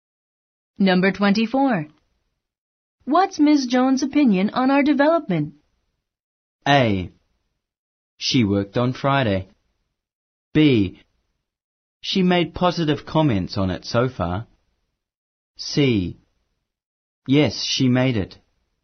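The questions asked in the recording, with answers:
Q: What's Ms. Jones' opinion on our development?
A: B: She made positive comments on it so far.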